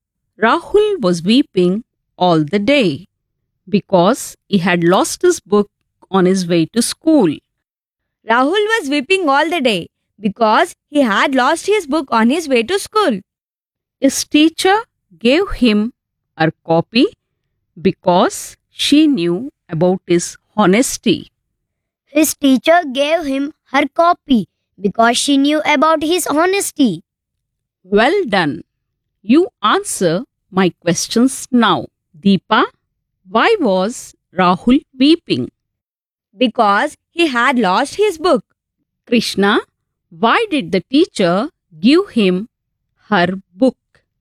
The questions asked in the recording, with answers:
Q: Deepa, why was Rahul weeping?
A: Because he had lost his book.

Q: Krishna, why did the teacher give him her book?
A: Because she knew that he was very honest.